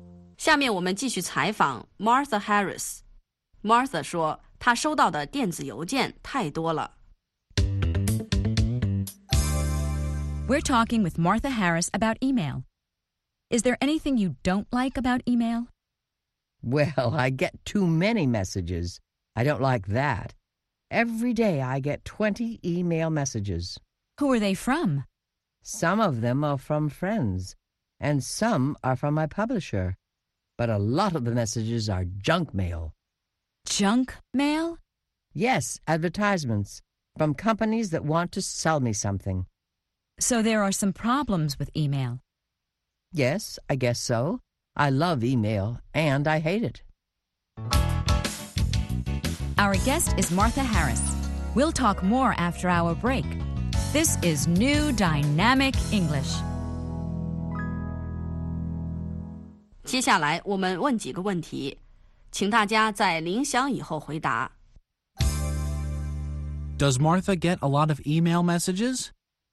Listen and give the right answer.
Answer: Yes, she gets too many messages.